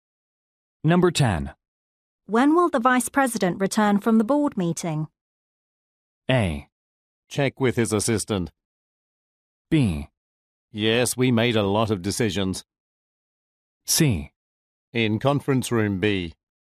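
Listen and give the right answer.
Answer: A: Check with his assistant.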